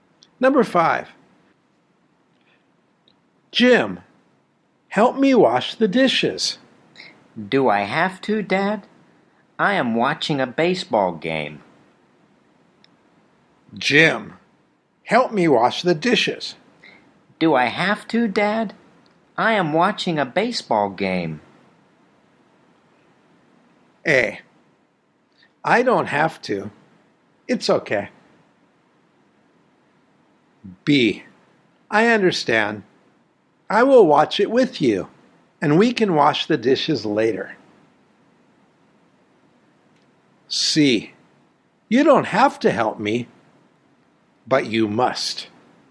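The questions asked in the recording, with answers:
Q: Do I have to, Dad? I am watching a baseball game.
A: B: I understand. I will watch it with you, and we can wash the dishes later.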